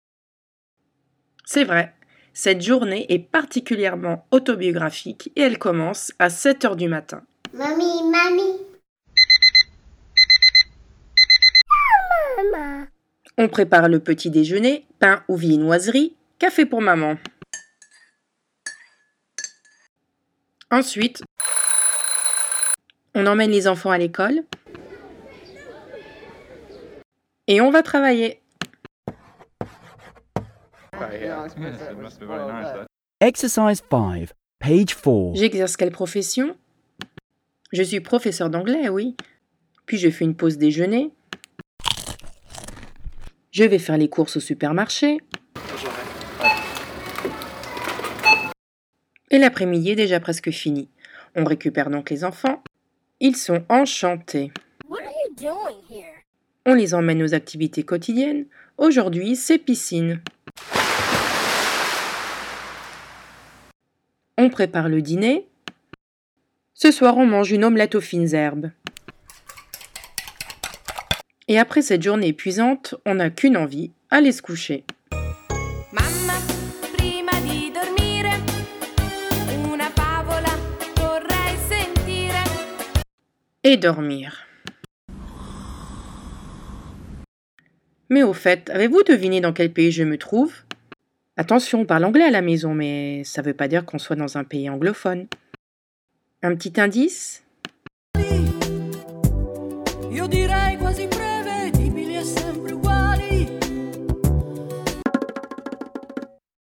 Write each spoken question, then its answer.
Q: Mais au fait, avez-vous deviné dans quel pays je me trouve ?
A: Bravo, c'est l'Italie.